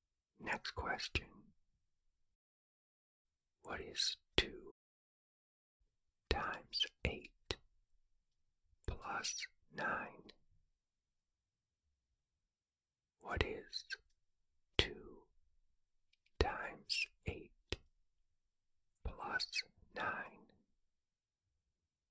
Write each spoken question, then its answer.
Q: What is 2 times 8 plus 9?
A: The answer is 25.